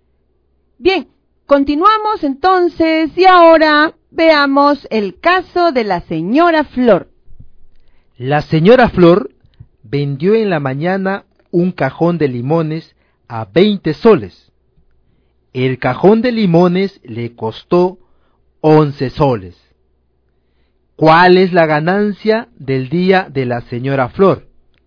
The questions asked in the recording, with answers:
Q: ¿Cuál es la ganancia del día de la señora Flor?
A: Y eso nos da una ganancia de 9 soles.